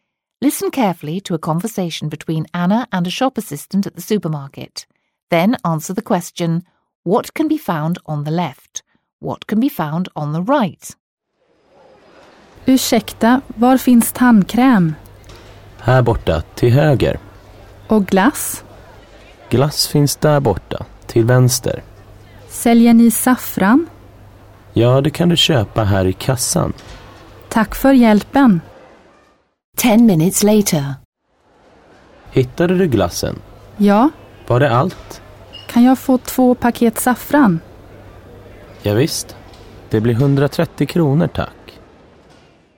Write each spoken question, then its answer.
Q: what can be found on the left?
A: That's right, it's the ice cream.

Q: What can be found on the right?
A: Yes, it's the toothpaste.